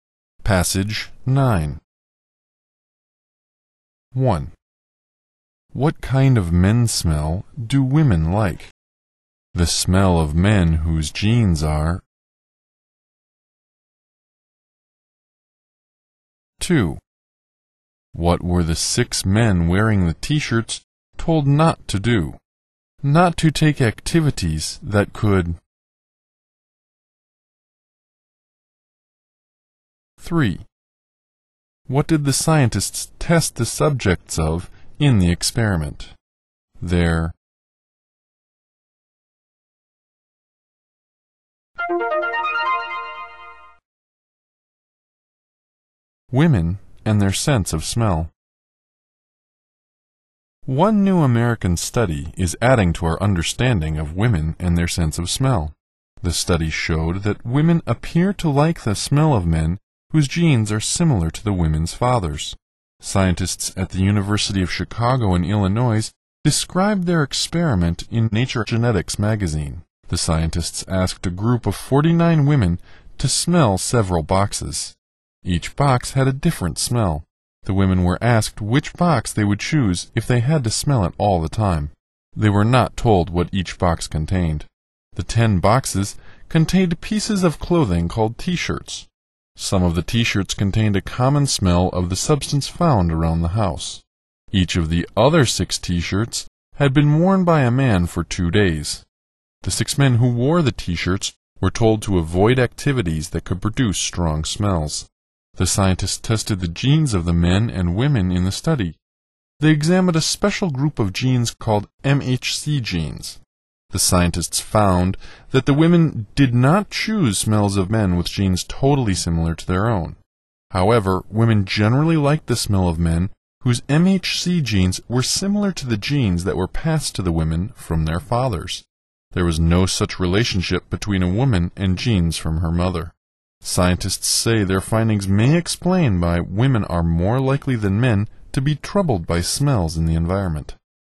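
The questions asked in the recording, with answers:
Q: What kind of men's smell do women like?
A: The smell of men whose genes are similar to the women's fathers

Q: What were the 6 men wearing the t-shirts told not to do?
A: Not to take activities that could produce strong smells

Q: What did the scientists test the subjects of in the experiment?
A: Their genes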